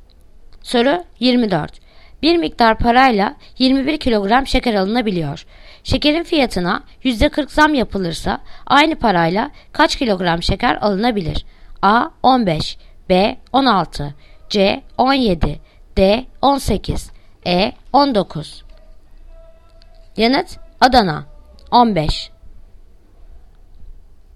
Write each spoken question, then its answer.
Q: Şekerin fiyatına %40 zam yapılırsa aynı parayla kaç kilogram şeker alınabilir?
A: Yanıt Adana 15